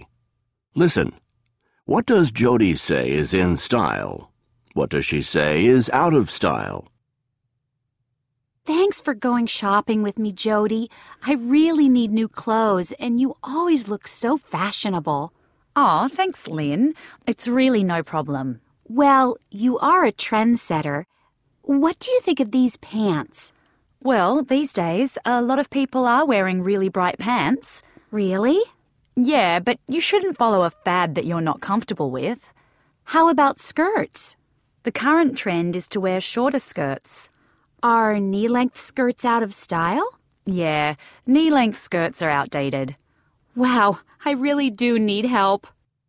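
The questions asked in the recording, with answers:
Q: What does Jody say is in style?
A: Really bright pants and shorter skirts

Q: What does she say is out of style?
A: Knee-length skirts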